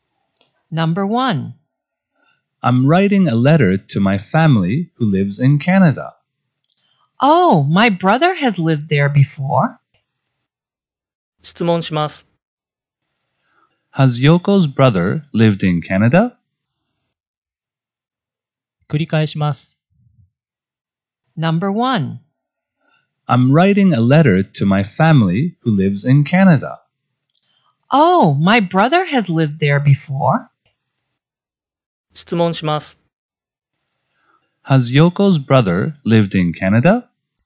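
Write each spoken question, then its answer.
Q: Has Yoko's brother lived in Canada?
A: Yes, he has.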